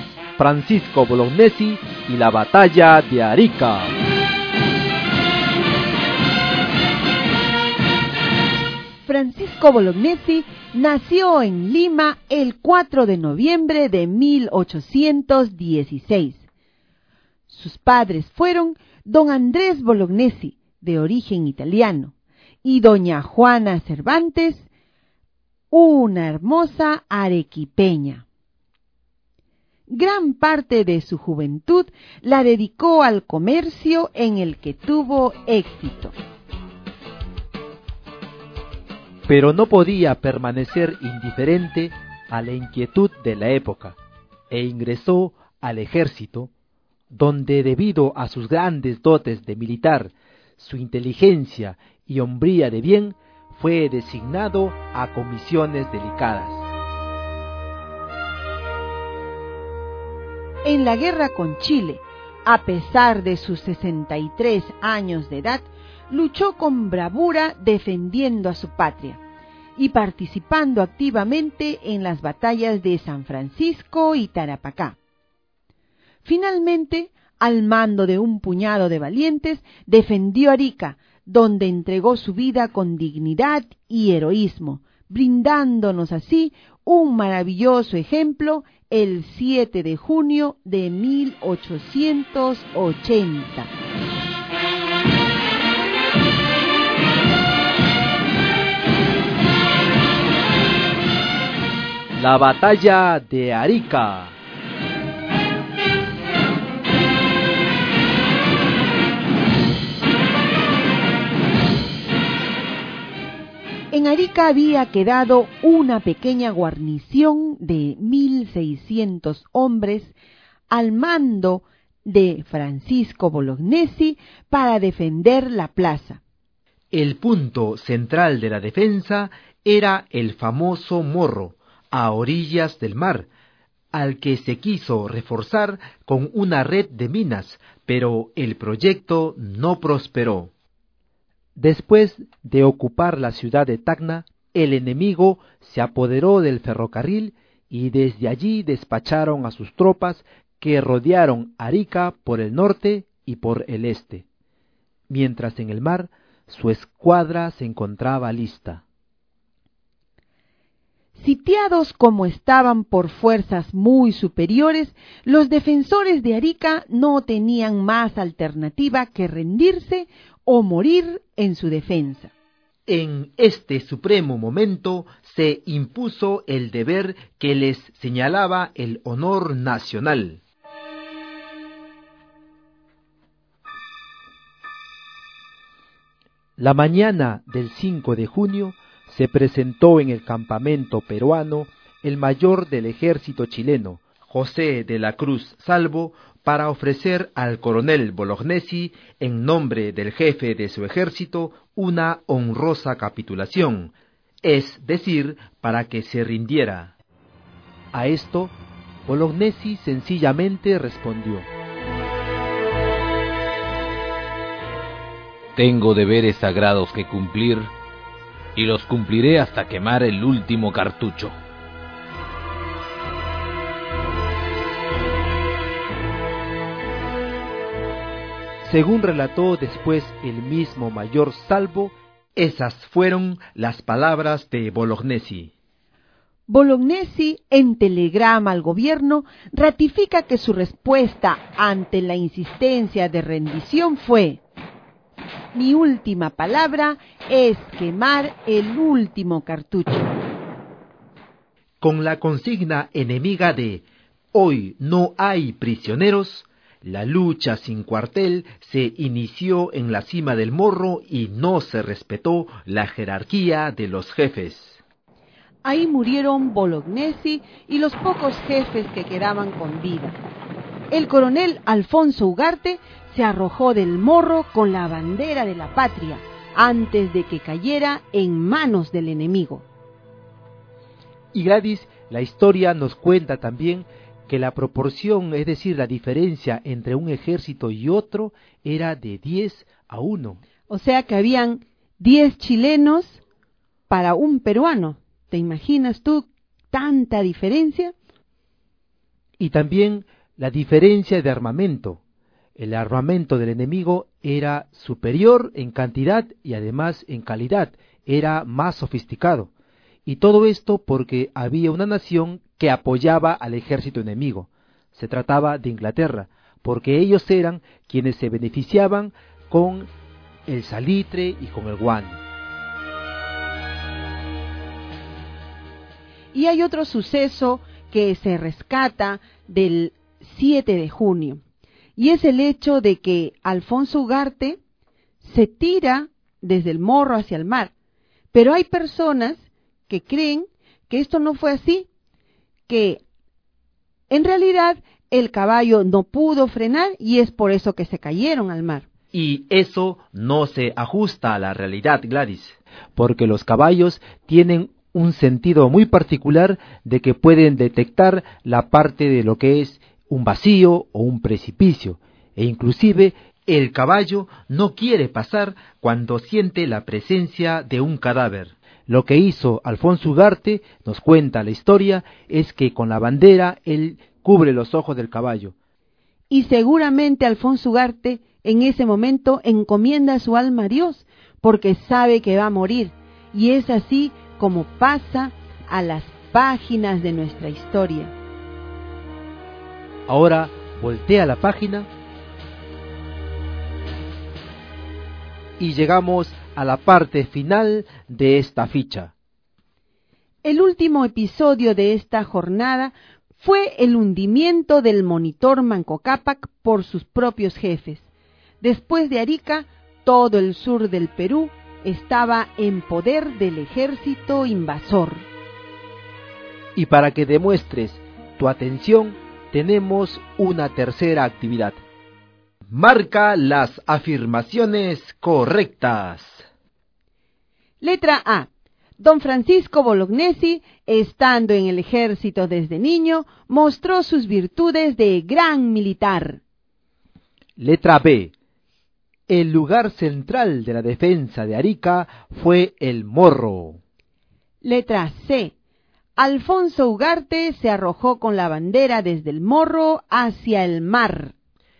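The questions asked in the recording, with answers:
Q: Letra A. Don Francisco Bolognesi, estando en el ejército desde niño, mostró sus virtudes de gran militar.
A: Falsa

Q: Letra B. El lugar central de la defensa de Arica fue el Morro.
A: Correcta

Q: Letra C. Alfonso Ugarte se arrojó con la bandera desde el Morro hacia el mar.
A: Correcta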